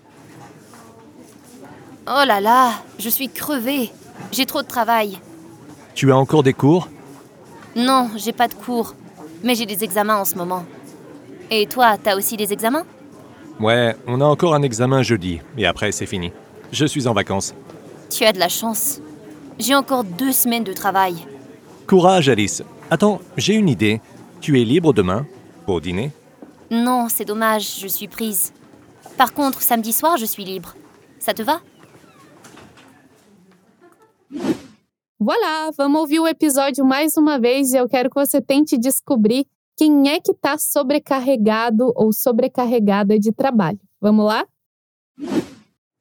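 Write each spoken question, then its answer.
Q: eu quero que você tente descobrir quem é que está sobrecarregado ou sobrecarregada de trabalho.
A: A moça, Alice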